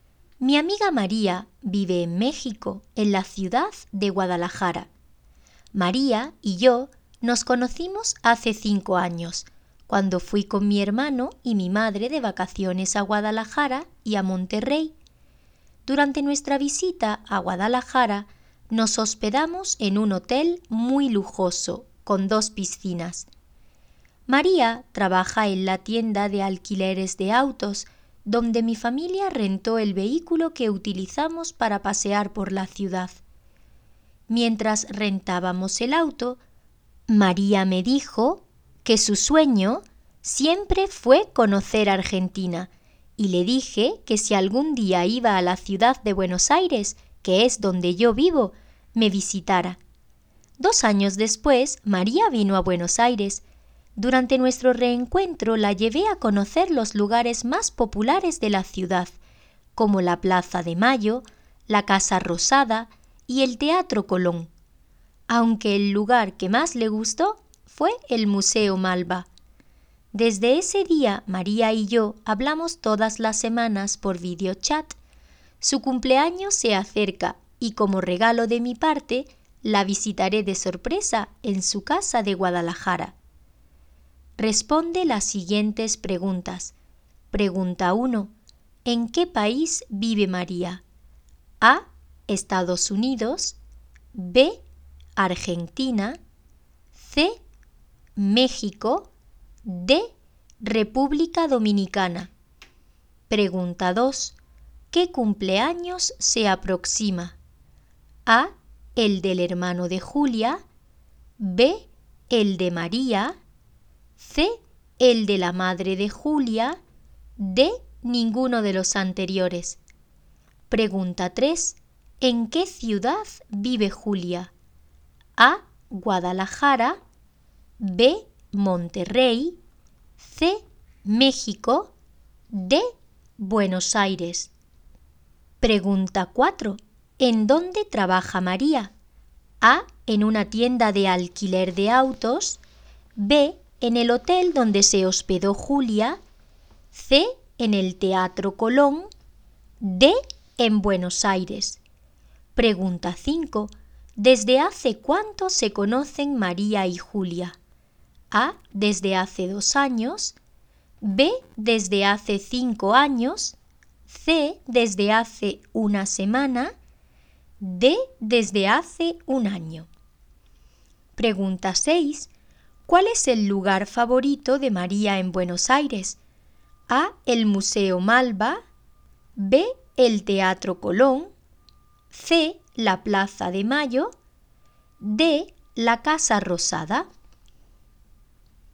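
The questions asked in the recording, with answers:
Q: ¿En qué país vive María?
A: C: México

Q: ¿Qué cumpleaños se aproxima?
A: B: El de María

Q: ¿En qué ciudad vive Julia?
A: D: Buenos Aires

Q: ¿En dónde trabaja María?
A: A: En una tienda de alquiler de autos

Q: ¿Desde hace cuánto se conocen María y Julia?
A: B: Desde hace 5 años

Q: ¿Cuál es el lugar favorito de María en Buenos Aires?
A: A: El Museo Malba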